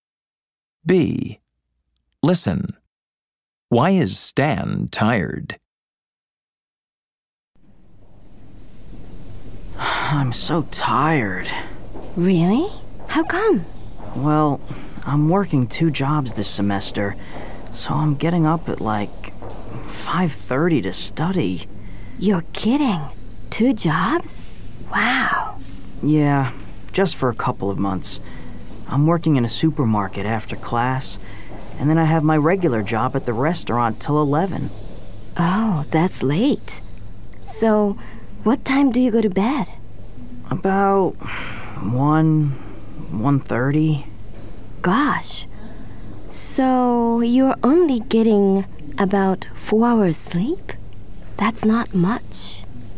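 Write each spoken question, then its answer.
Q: Why is Stan tired?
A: He's working two jobs, so he gets up at 5:30 and only sleeps about 4 hours.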